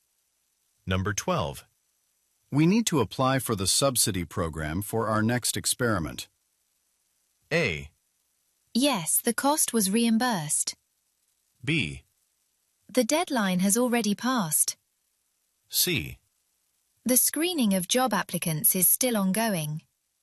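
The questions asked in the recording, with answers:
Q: We need to apply for the subsidy program for our next experiment.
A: B: The deadline has already passed.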